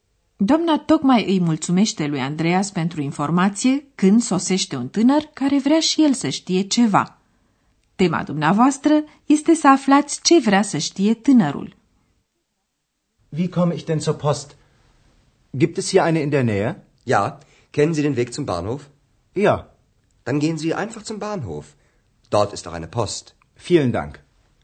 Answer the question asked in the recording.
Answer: Tânărul întreabă dacă există o poștă în apropiere de Hotel Europa.